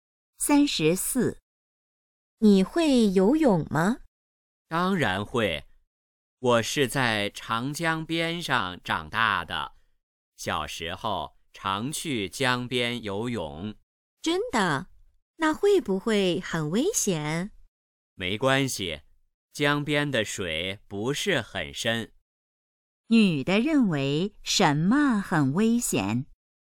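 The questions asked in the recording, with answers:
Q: 女的认为什么很危险?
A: 在江边游泳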